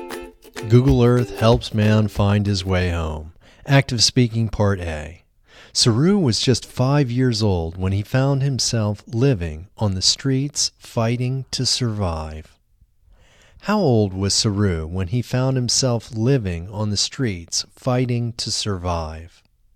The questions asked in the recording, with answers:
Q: How old was Saru when he found himself living on the streets fighting to survive?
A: Saru was just 5 years old when he found himself living on the streets fighting to survive.